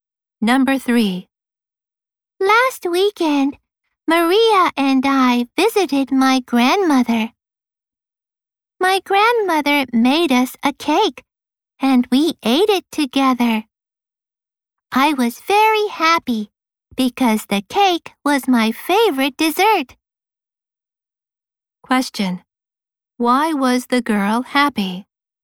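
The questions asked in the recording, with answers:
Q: Why was the girl happy?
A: Her grandmother made her favorite dessert, a cake.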